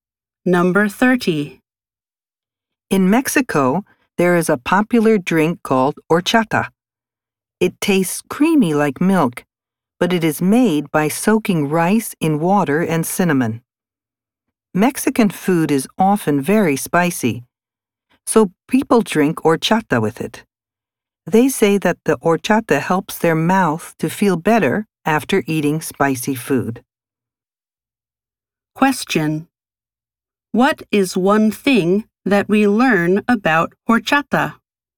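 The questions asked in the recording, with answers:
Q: What is one thing that we learn about horchata?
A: It is made by soaking rice in water and cinnamon (people drink it with spicy food).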